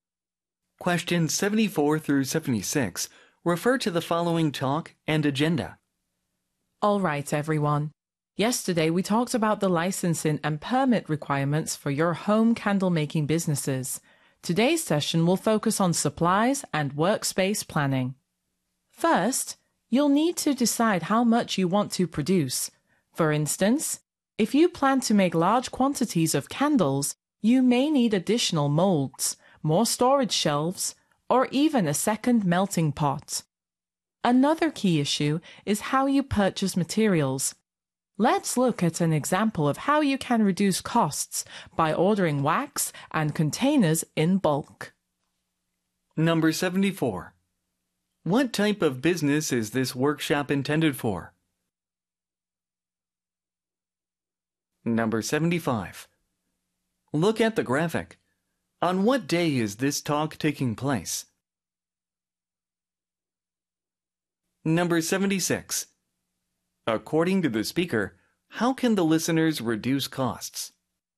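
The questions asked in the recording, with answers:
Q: What type of business is this workshop intended for?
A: Home candle-making businesses

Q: According to the speaker, how can the listeners reduce costs?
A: By ordering wax and containers in bulk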